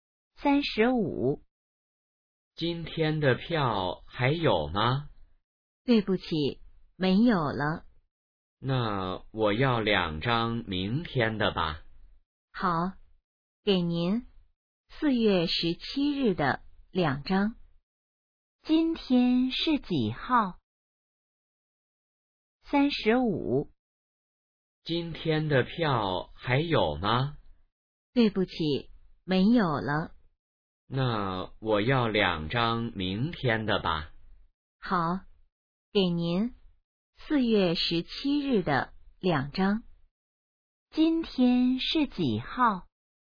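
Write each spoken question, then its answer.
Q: 今天是几号?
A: 4月16日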